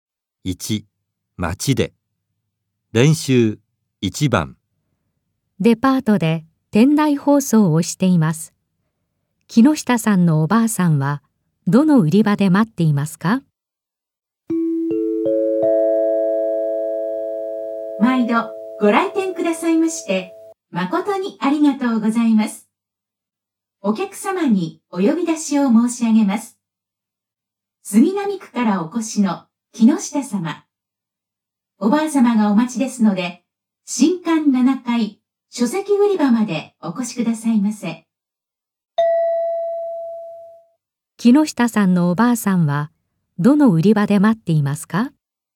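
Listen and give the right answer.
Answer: 新館7階の書籍売り場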